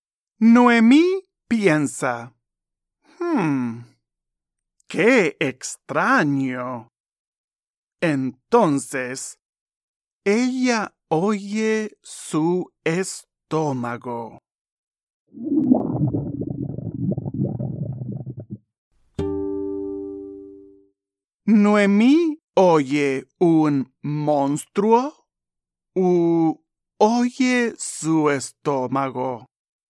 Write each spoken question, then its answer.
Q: Noemí oye un monstruo u oye su estómago.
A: Exacto. Noemí oye su estómago.